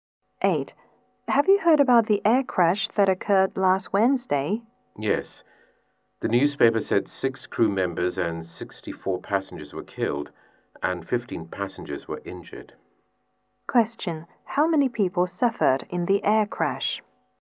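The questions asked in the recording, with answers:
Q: How many people suffered in the air crash?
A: 85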